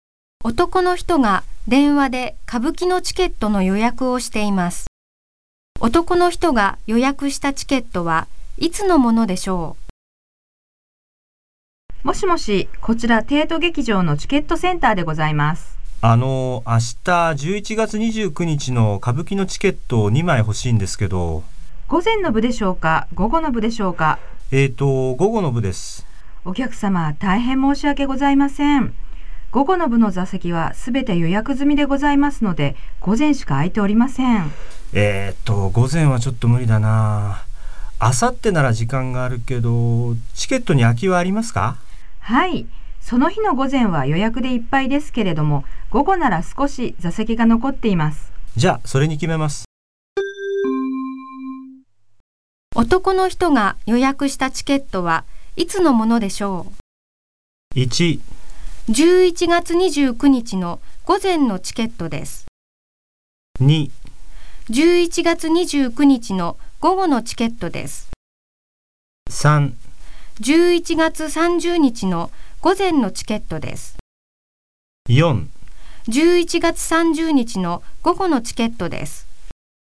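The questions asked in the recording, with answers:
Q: 男の人が予約したチケットはいつのものでしょう?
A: 4: 11月30日の午後のチケットです。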